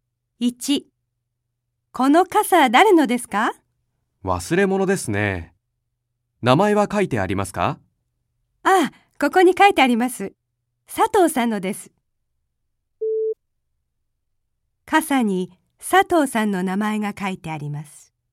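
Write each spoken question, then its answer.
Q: 傘に佐藤さんの名前が書いてあります。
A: ○(正しい)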